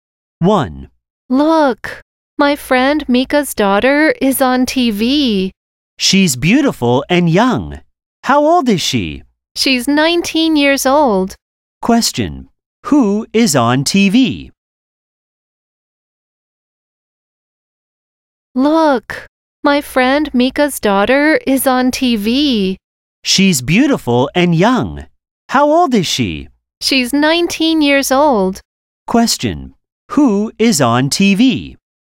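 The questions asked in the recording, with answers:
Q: Who is on TV?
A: Mika's daughter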